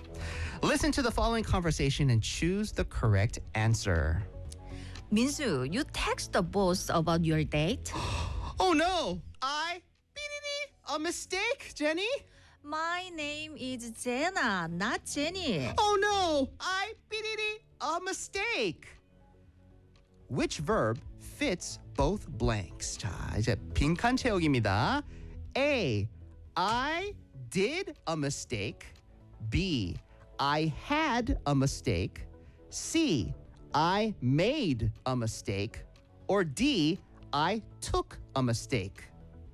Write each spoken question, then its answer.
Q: Which verb fits both blanks?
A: 이거는 made a mistake예요.